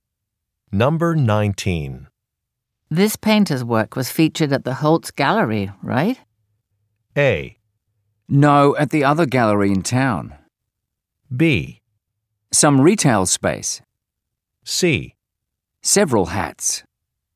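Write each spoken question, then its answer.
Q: This painter's work was featured at the Holtz Gallery, right?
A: A: No, at the other gallery in town.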